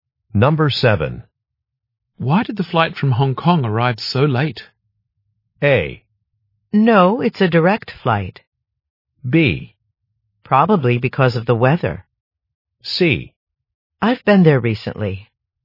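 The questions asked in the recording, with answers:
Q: Why did the flight from Hong Kong arrive so late?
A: B: Probably because of the weather.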